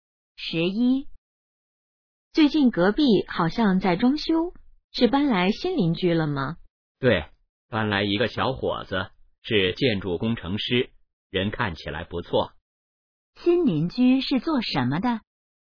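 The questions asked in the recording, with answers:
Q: 新邻居是做什么的?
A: 建筑工程师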